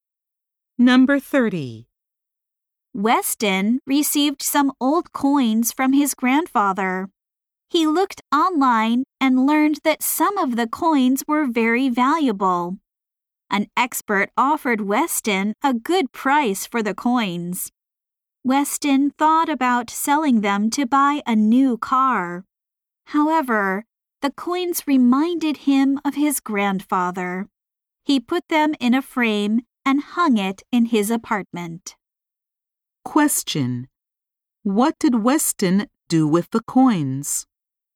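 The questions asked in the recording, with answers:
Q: What did Weston do with the coins?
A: He put them in a frame and hung it in his apartment.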